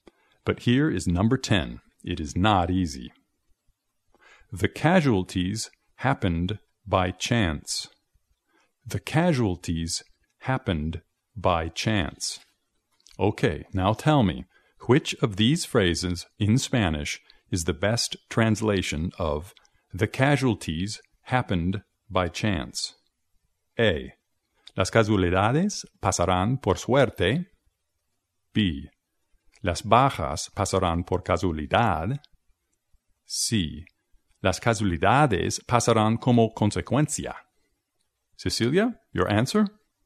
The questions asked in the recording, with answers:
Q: Okay, now tell me, which of these phrases in Spanish is the best translation of the casualties happened by chance?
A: Así que la correcta debe ser las bajas pasaron por casualidad.